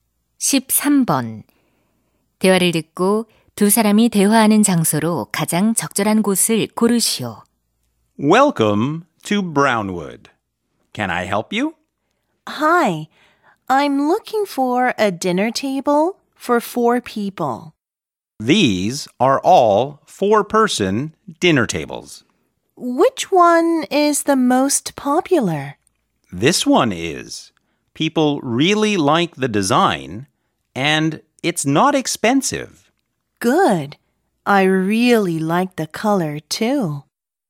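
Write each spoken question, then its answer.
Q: 대화를 듣고 두 사람이 대화하는 장소로 가장 적절한 곳을 고르시오.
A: 가구점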